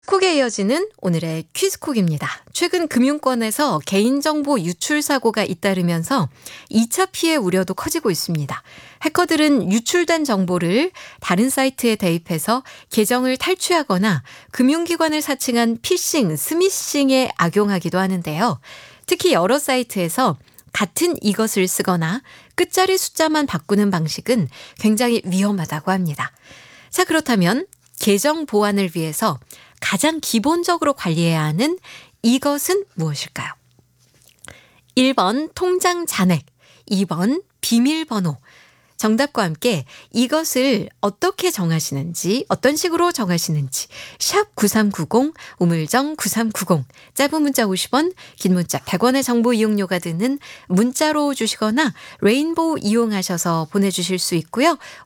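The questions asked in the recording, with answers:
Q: 자, 그렇다면 계정 보안을 위해서 가장 기본적으로 관리해야 하는 이것은 무엇일까요?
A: 2번: 비밀번호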